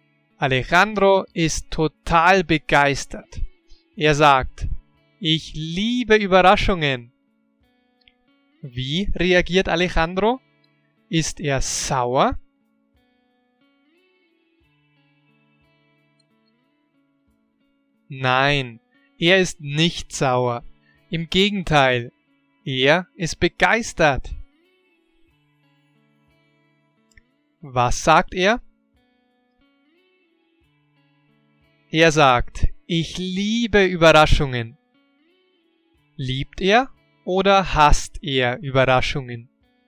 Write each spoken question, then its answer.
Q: Liebt er oder hasst er Überraschungen?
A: Er liebt Überraschungen.